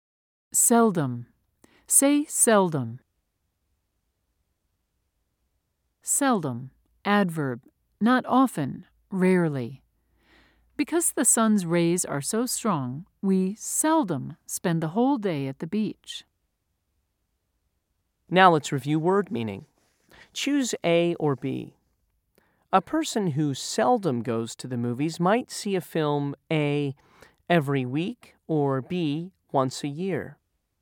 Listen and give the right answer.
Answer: If you said B, you are right.